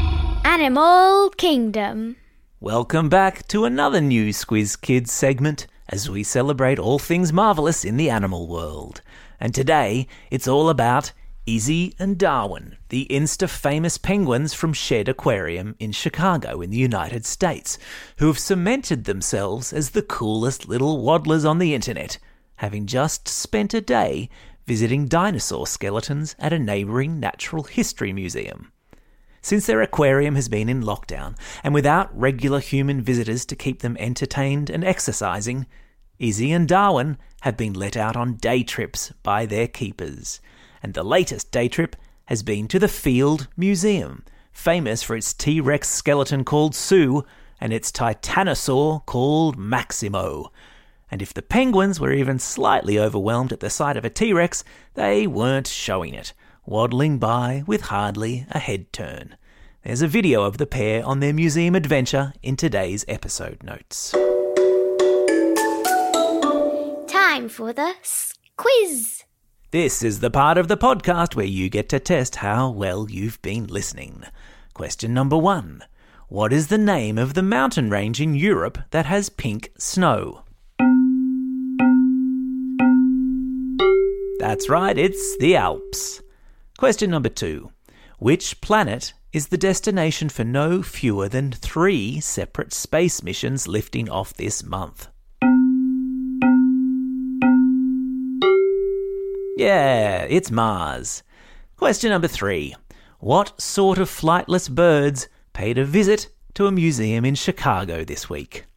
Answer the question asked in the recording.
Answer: You got it, it's penguins.